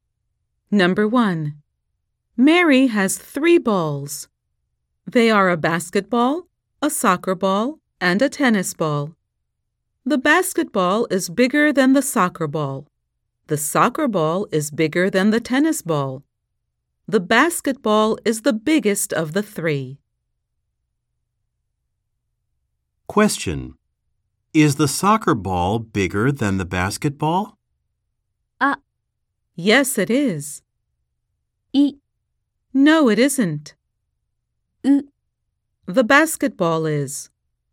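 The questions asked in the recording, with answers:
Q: Is the soccer ball bigger than the basketball?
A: B: No, it isn't.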